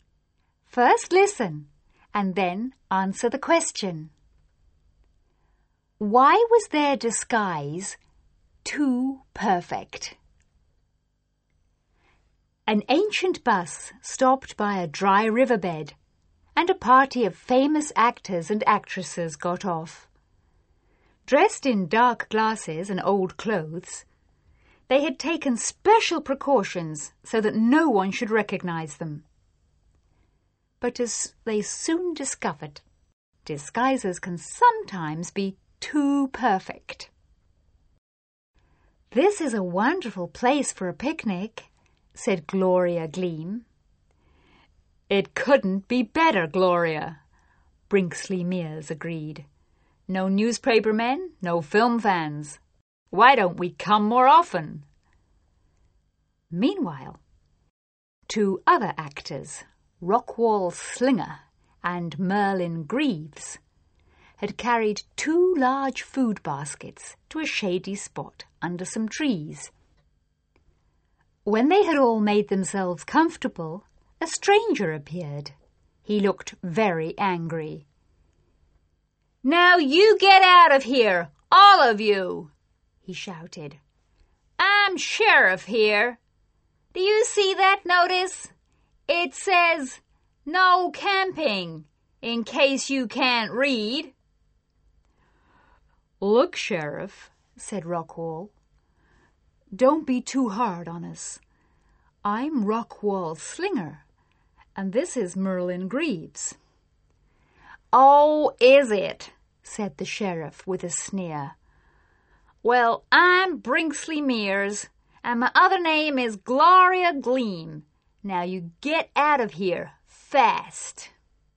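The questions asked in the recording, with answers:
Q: Why was their disguise too perfect?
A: The sheriff did not recognize them and did not believe they were famous actors.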